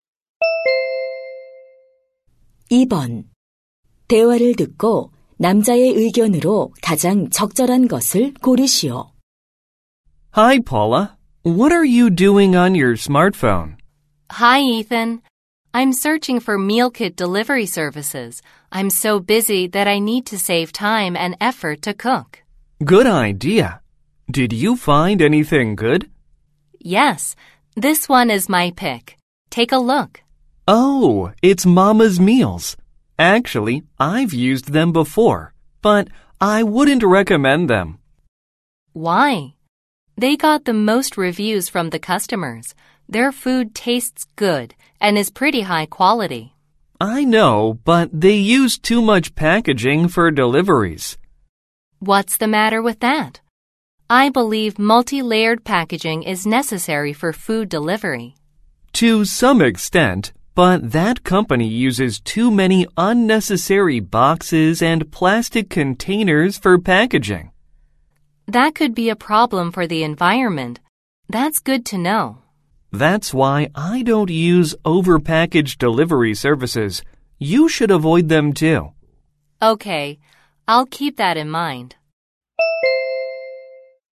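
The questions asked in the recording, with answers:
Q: 대화를 듣고 남자의 의견으로 가장 적절한 것을 고르시오.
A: 과대 포장하는 배달 서비스는 이용하지 말아야 한다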